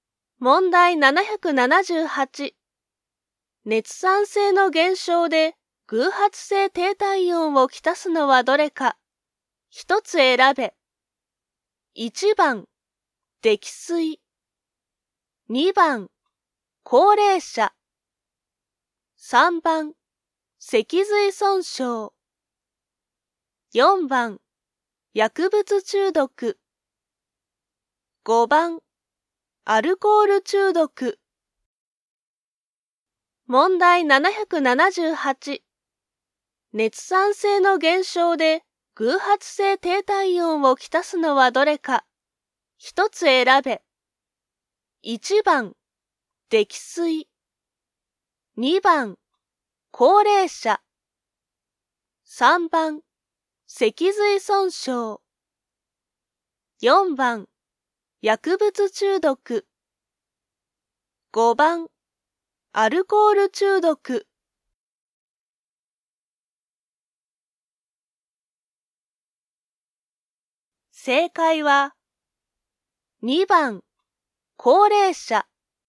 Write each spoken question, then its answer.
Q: 熱産生の減少で、偶発性低体温をきたすのはどれか。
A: 正解は、2番、高齢者。